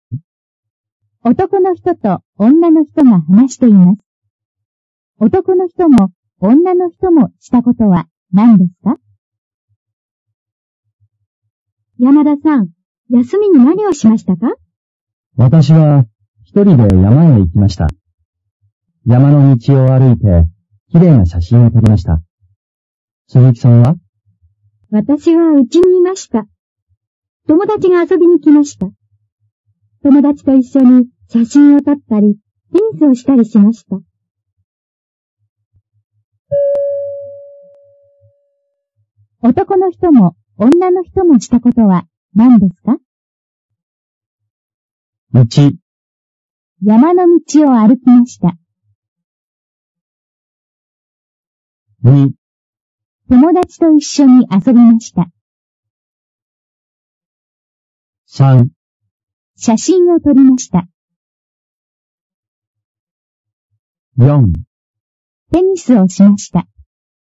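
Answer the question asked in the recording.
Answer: 3: 写真を撮りました。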